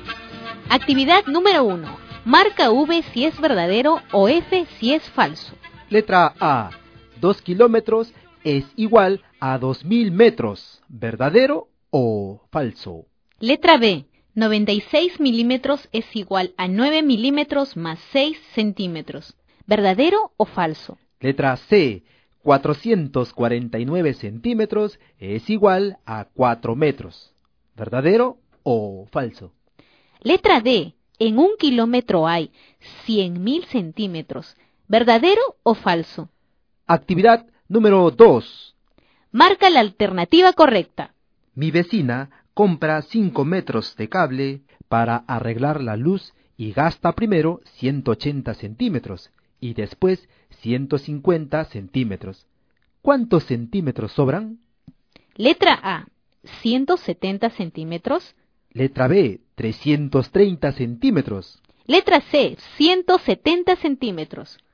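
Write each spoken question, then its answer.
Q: Letra A. 2 kilómetros es igual a 2.000 metros, ¿verdadero o falso?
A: Verdadero

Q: Letra C, 449 centímetros es igual a 4 metros, ¿verdadero o falso?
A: Falso

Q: Letra D, en un kilómetro hay 100.000 centímetros, ¿verdadero o falso?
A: Verdadero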